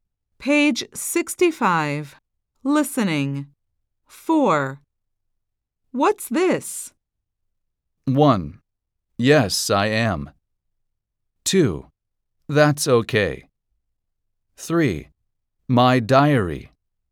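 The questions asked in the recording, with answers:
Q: What's this?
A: 3: My diary.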